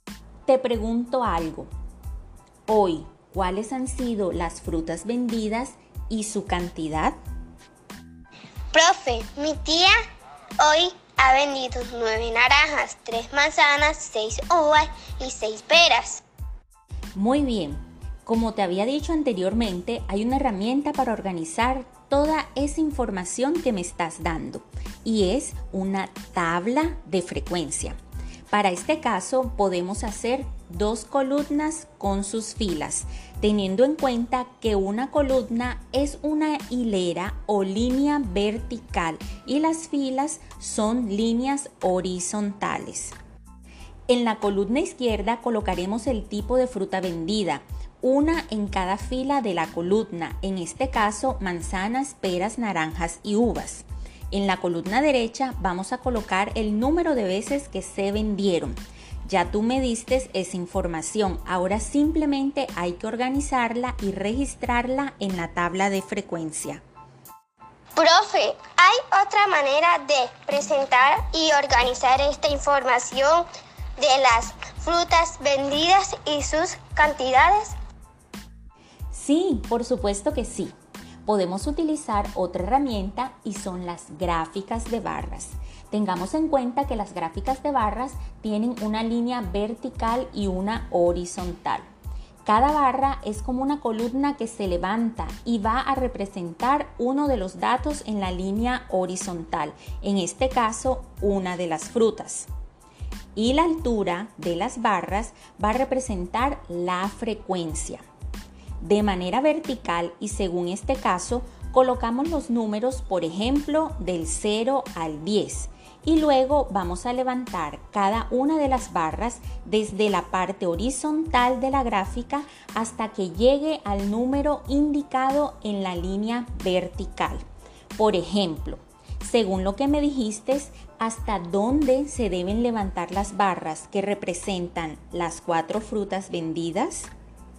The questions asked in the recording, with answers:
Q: Por ejemplo, según lo que me dijiste, hasta dónde se deben levantar las barras que representan las cuatro frutas vendidas,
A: pues, la barra que representa las manzanas debe llegar hasta el 3, las uvas hasta el 6, las naranjas hasta el 9 y la espera hasta el 6.